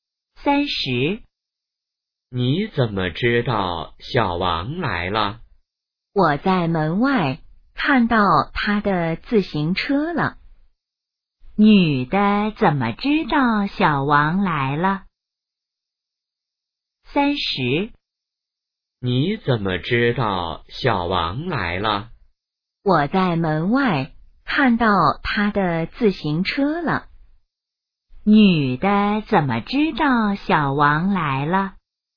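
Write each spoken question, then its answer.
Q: 女的怎么知道小王来了?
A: 在门外看到了他的自行车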